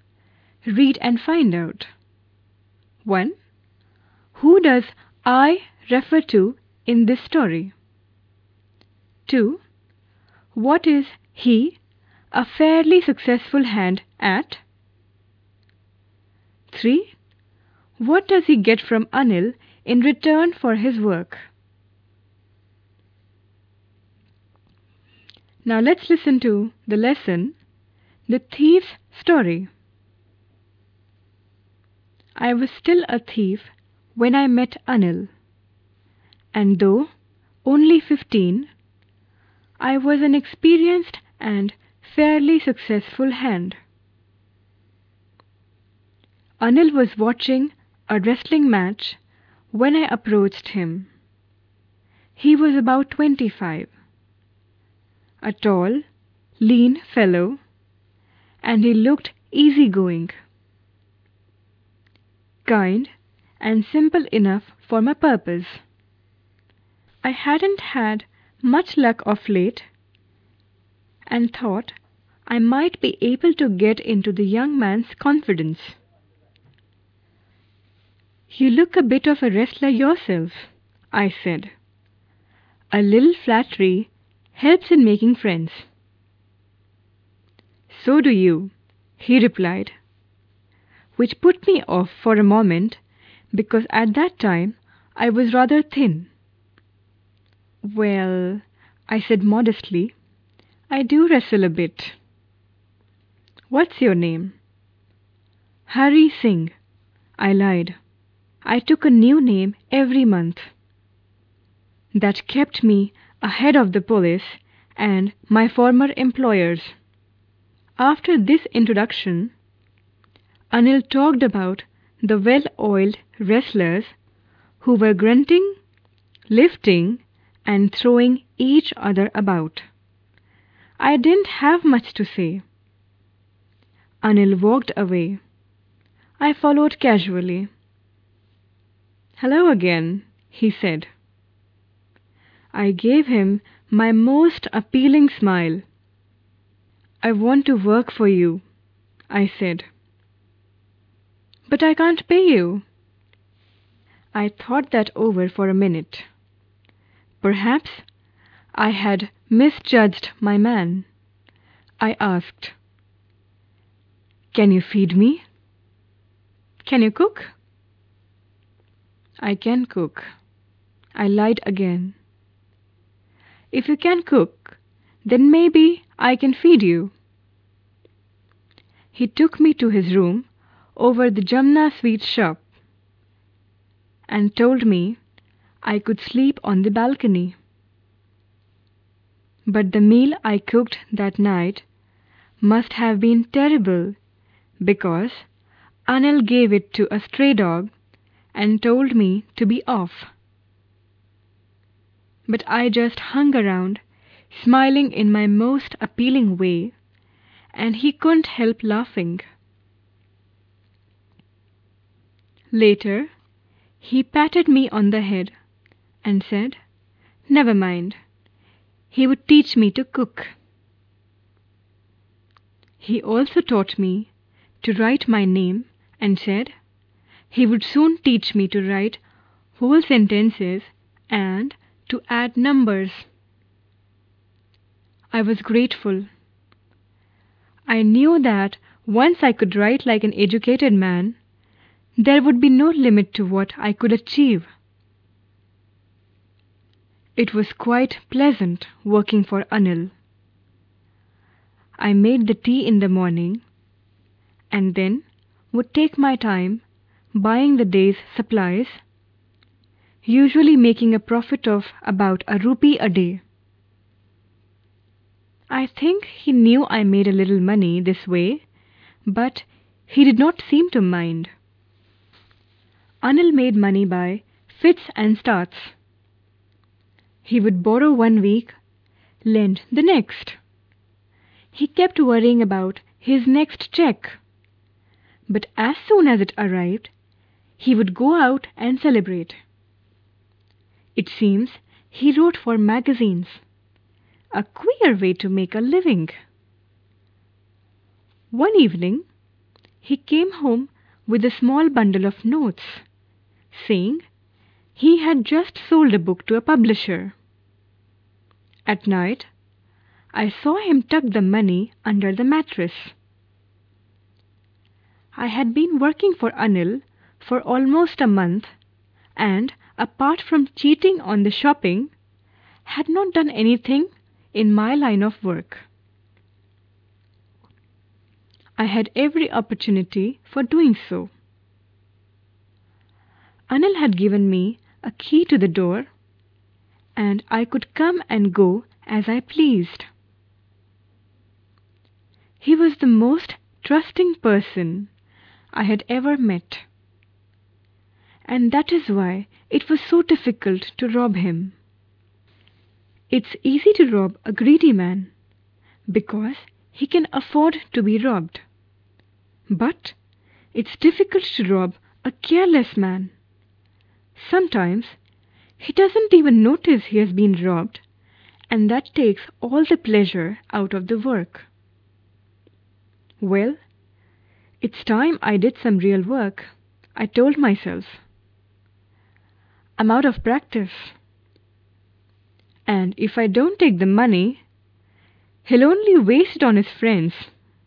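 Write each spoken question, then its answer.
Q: Who does I refer to in this story?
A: The thief, a 15-year-old boy calling himself Hari Singh

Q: What is he, a fairly successful hand, at?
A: Stealing (being a thief)

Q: What does he get from Anil in return for his work?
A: Food, a place to sleep, and lessons in writing and numbers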